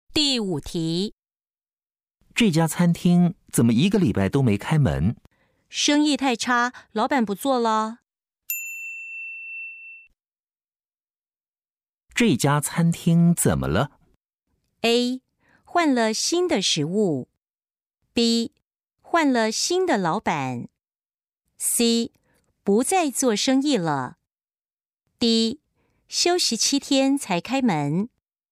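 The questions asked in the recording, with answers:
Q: 这家餐厅怎么了?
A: C: 不再做生意了。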